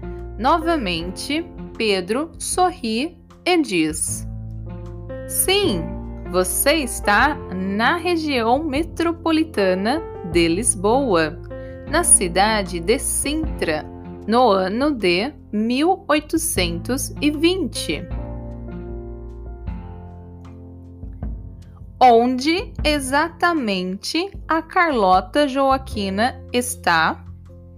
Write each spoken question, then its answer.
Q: onde exatamente a Carlota Joaquina está.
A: Ela está na região metropolitana de Lisboa, na cidade de Sintra, no ano de 1820.